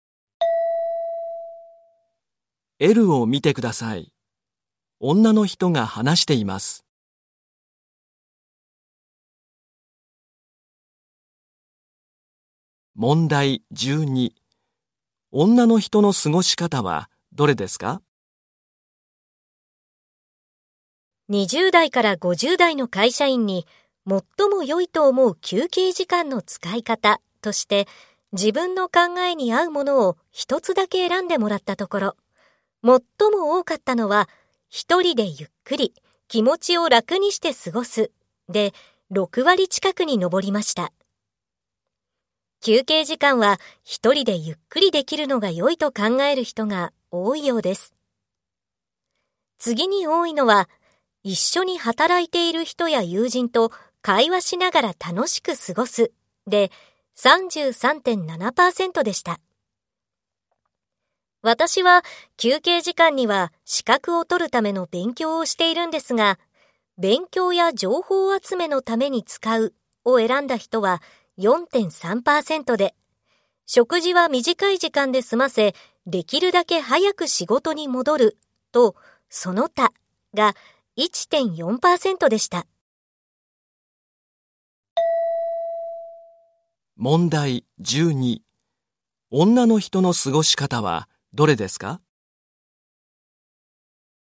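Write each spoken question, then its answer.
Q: 女の人の過ごし方はどれですか?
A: 資格を取るための勉強(勉強や情報集めのために使う)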